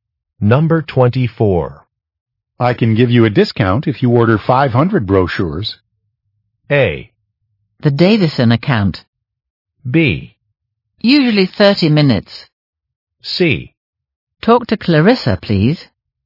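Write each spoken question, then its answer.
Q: I can give you a discount if you order 500 brochures.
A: C: Talk to Clarissa, please.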